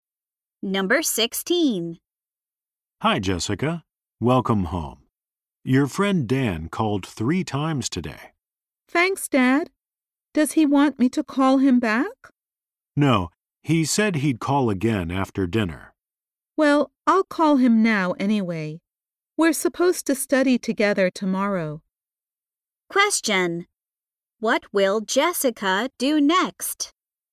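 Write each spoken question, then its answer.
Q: what will Jessica do next?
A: Call Dan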